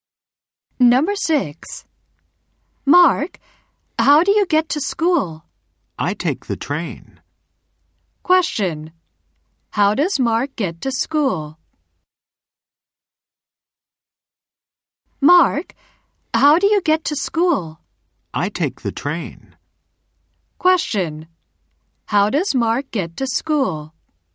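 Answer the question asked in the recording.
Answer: He takes the train.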